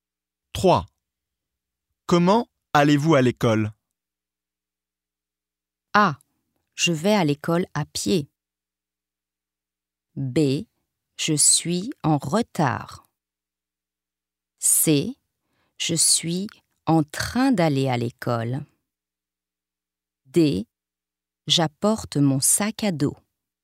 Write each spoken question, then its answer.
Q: Comment allez-vous à l'école?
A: A. Je vais à l'école à pied.